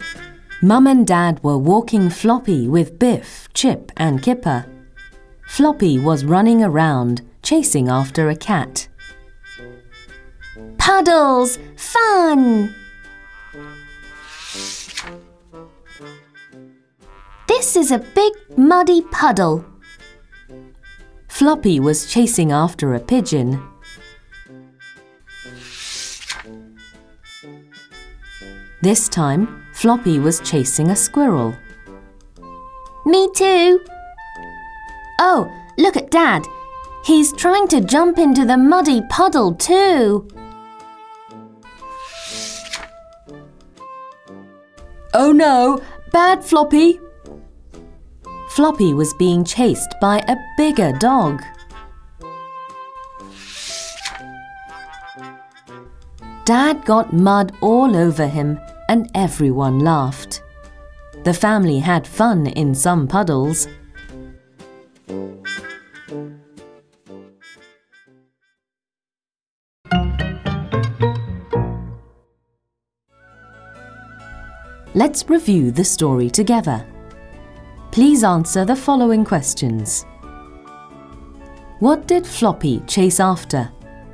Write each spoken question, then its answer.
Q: What did Floppy chase after?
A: A cat, a pigeon, a squirrel.